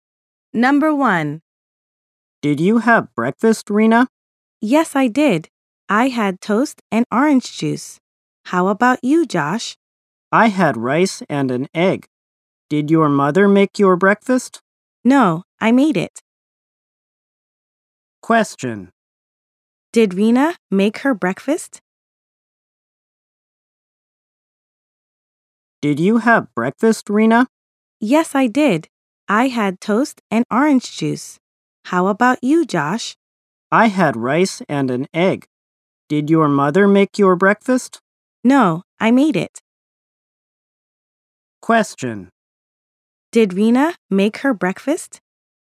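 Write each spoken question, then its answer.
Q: Did Rena make her breakfast?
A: Yes, she did.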